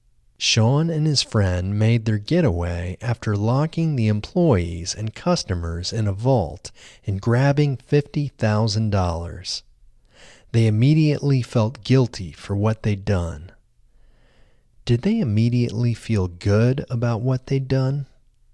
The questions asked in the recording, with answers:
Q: Did they immediately feel good about what they'd done?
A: No, they didn't immediately feel good about what they'd done.